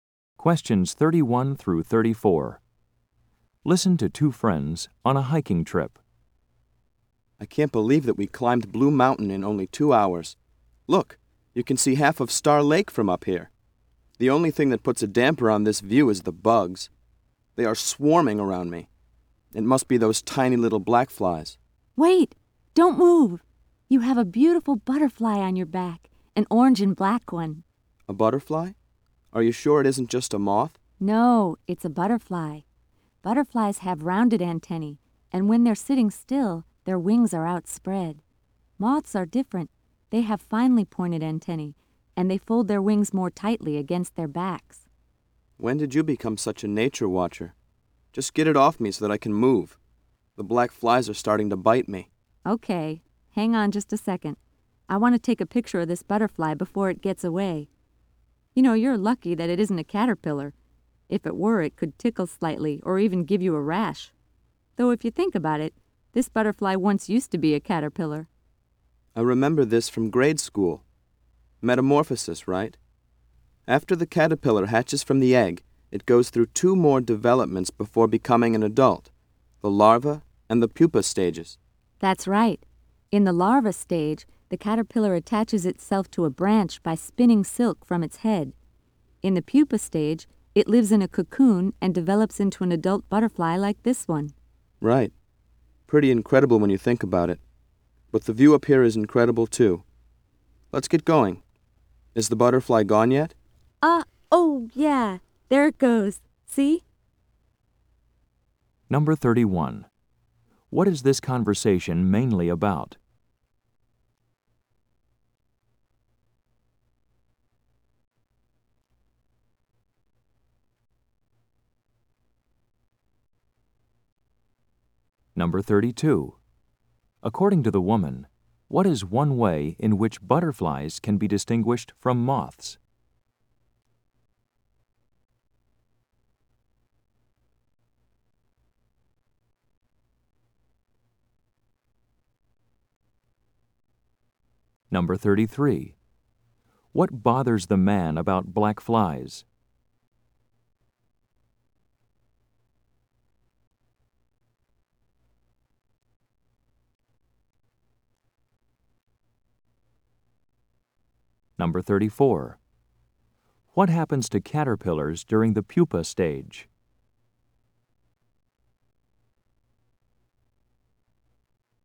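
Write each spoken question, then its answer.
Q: According to the woman, what is one way in which butterflies can be distinguished from moths?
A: Butterflies have rounded antennae (and spread their wings when still)

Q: What bothers the man about black flies?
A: They swarm around him and bite him

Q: What happens to caterpillars during the pupa stage?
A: They live in a cocoon and develop into adult butterflies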